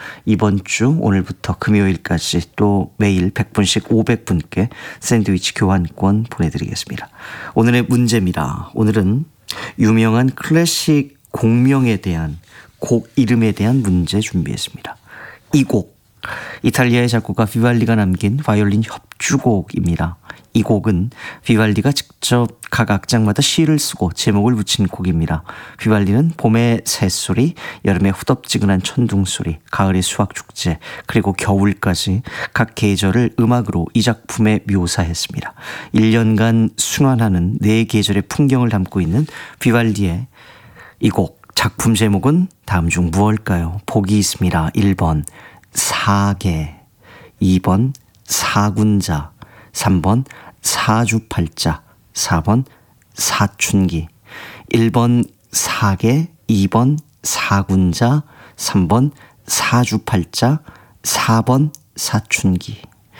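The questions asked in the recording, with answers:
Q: 1년간 순환하는 네 계절의 풍경을 담고 있는 비발디의 이 곡, 작품 제목은 다음 중 무엇일까요?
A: 1번: 사계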